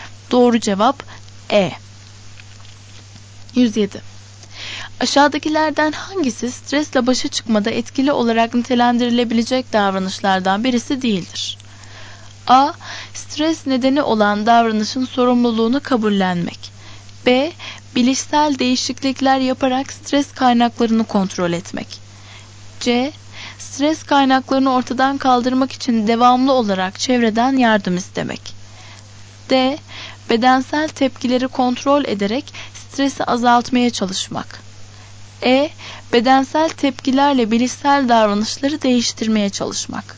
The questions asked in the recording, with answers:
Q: Aşağıdakilerden hangisi stresle başa çıkmada etkili olarak nitelendirilebilecek davranışlardan birisi değildir?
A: Doğru cevap C.